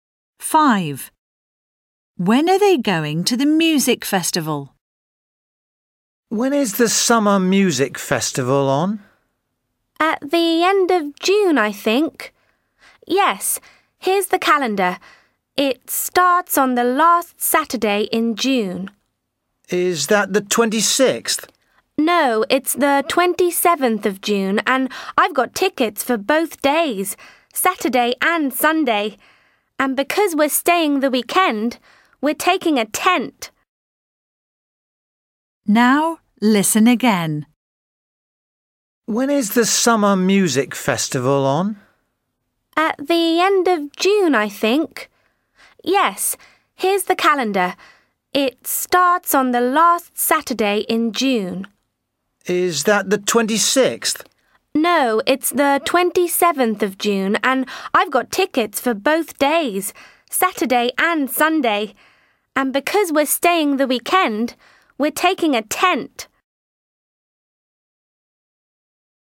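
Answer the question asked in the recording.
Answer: Saturday 27th and Sunday 28th June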